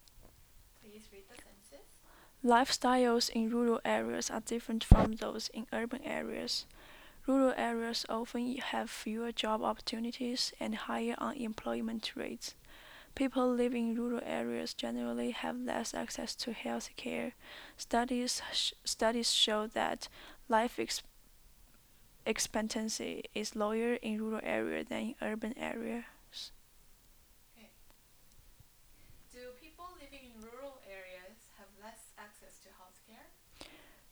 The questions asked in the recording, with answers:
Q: Do people living in rural areas have less access to health care?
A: Yes, people live in rural areas have less access to health care.